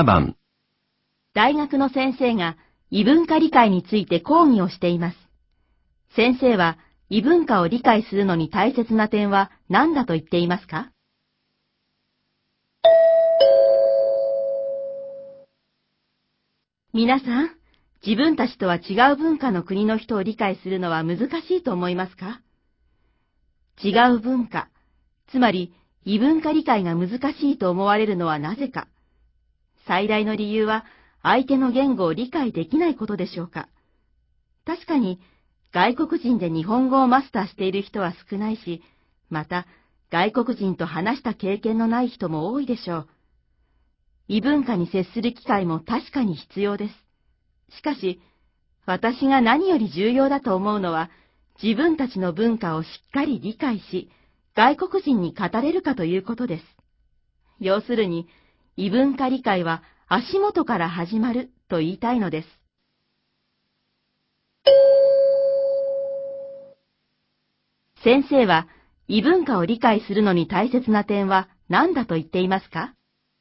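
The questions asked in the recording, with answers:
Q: 先生は、異文化を理解するのに大切な点は何だと言っていますか?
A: 自分たちの文化をしっかり理解し、外国人に語れること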